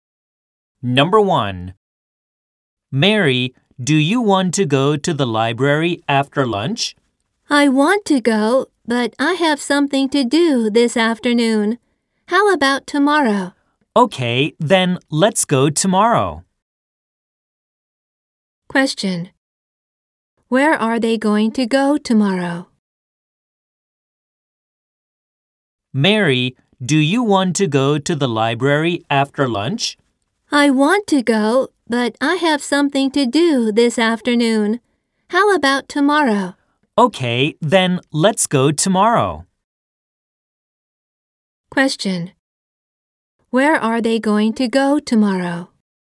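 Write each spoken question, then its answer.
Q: Where are they going to go tomorrow?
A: To the library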